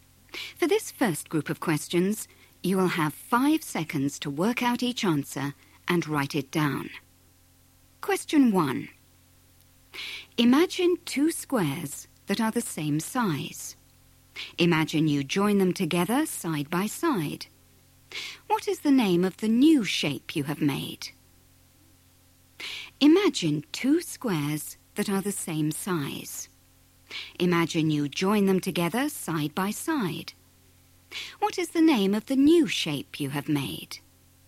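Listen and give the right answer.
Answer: rectangle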